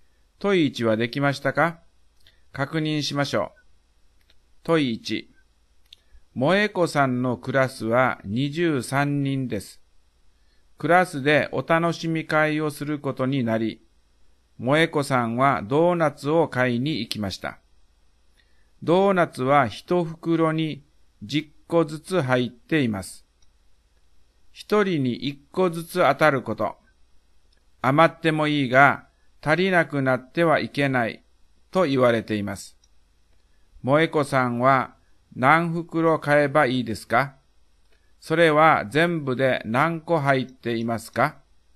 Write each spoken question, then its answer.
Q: 萌子さんは何袋買えばいいですか?それは全部で何個入っていますか?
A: 答えは3袋30個です。